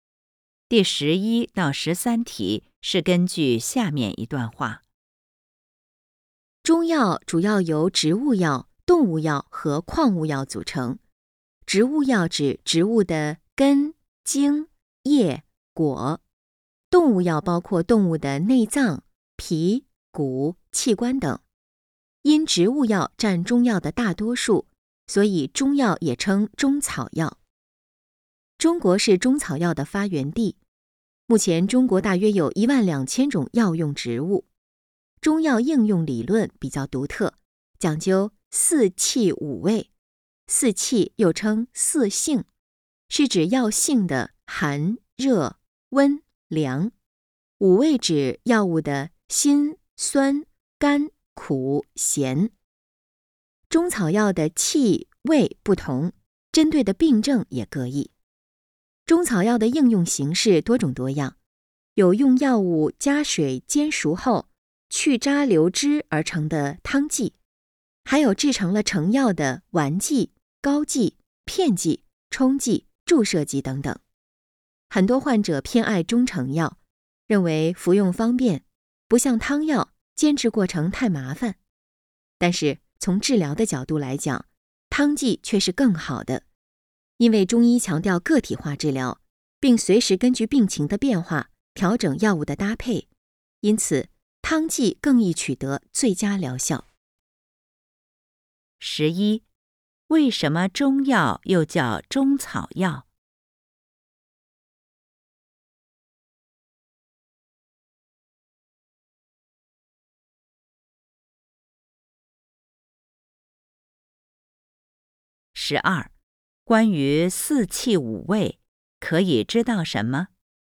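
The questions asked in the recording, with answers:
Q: 为什么中药又叫中草药?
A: 因为植物药占中药的大多数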